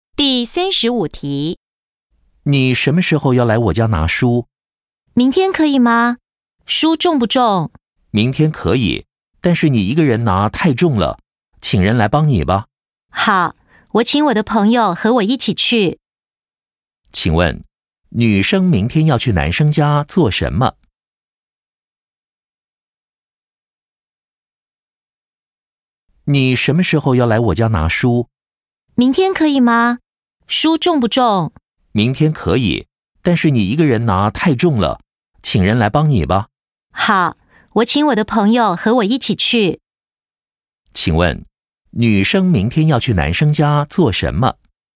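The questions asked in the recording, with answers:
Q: 请问,女生明天要去男生家做什么?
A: 拿书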